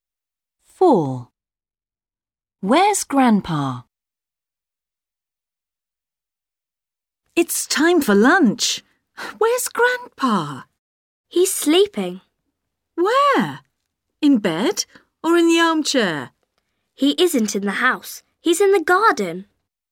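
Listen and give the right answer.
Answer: in the garden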